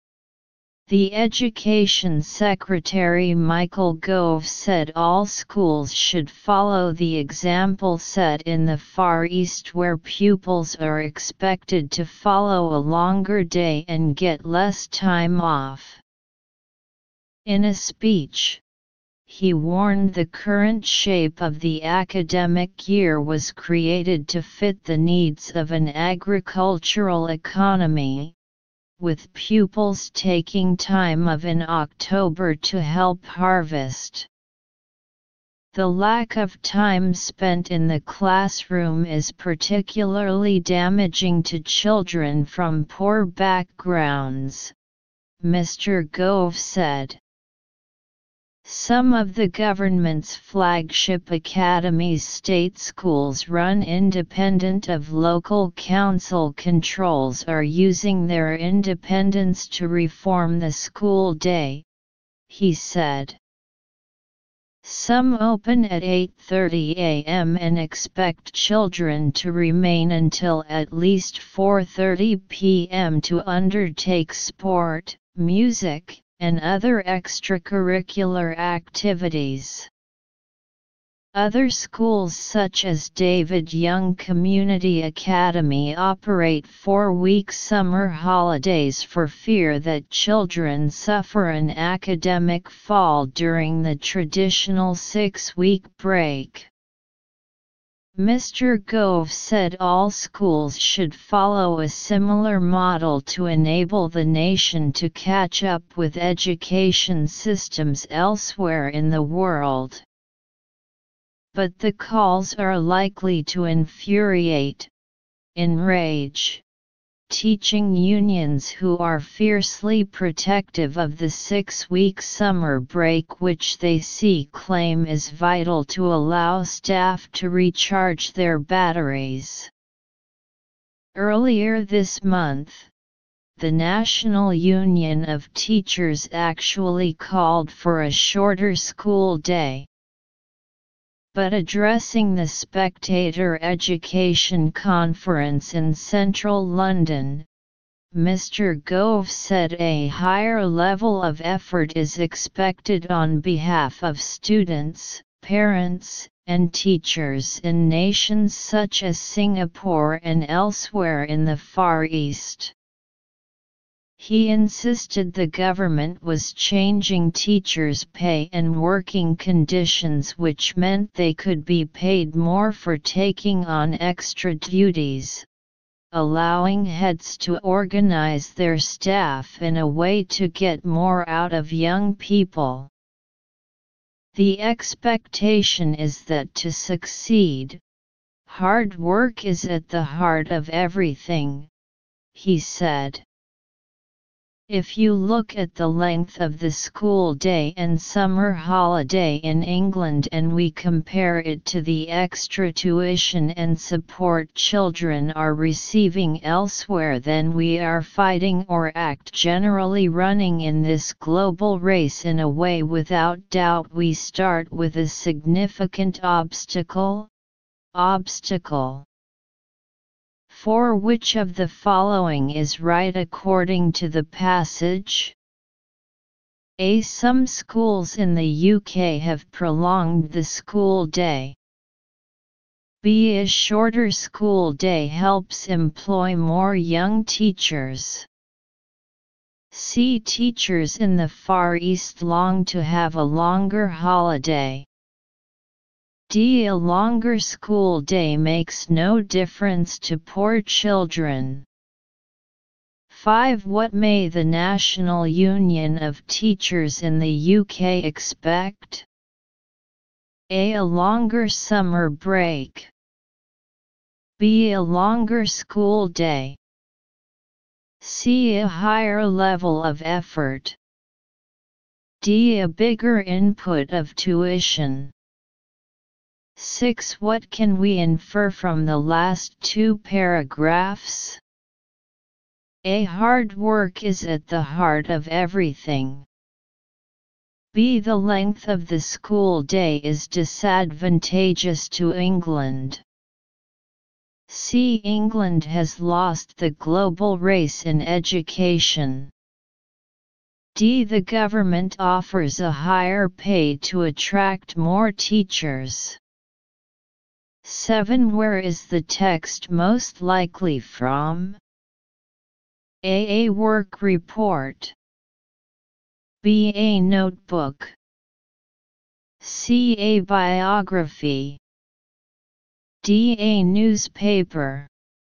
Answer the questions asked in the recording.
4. Answer 4. A
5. 5. A
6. 6. B
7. 7. D.